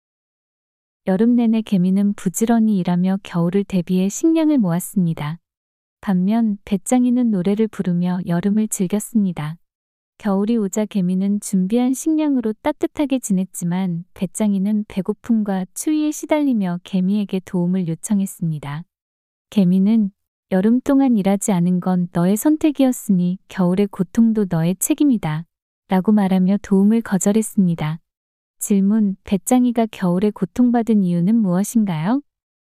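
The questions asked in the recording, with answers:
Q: 배짱이가 겨울에 고통받은 이유는 무엇인가요?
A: 여름 동안 일하지 않고 노래만 부르며 식량을 준비하지 않았기 때문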